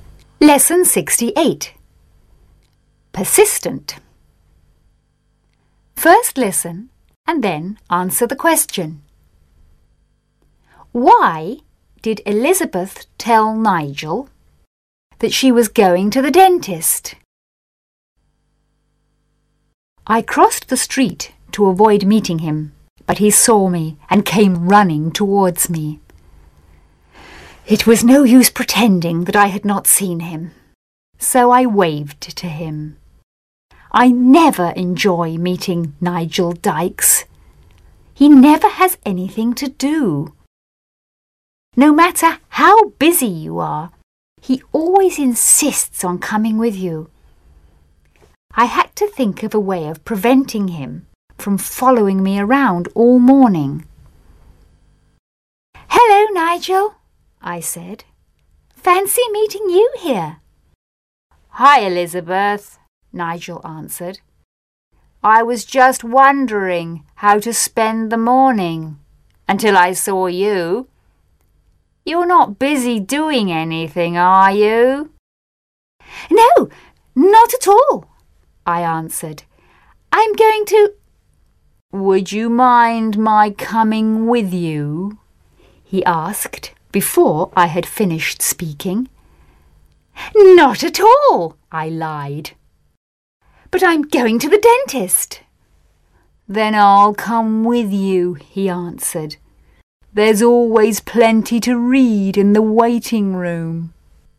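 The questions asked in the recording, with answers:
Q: Why did Elizabeth tell Nigel that she was going to the dentist?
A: To stop him from following her around all morning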